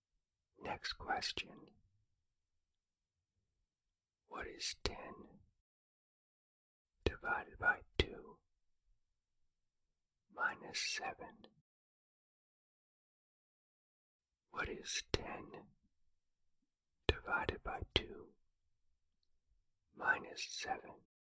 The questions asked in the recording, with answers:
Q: What is 10 divided by 2 minus 7?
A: The answer is negative 2.